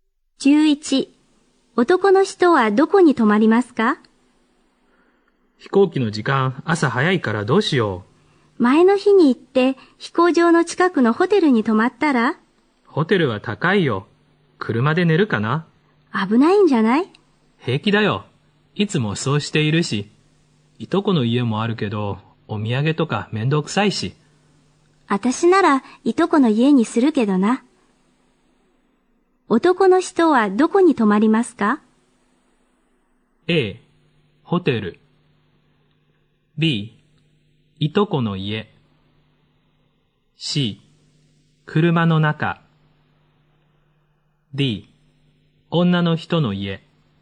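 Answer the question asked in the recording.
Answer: C: 車の中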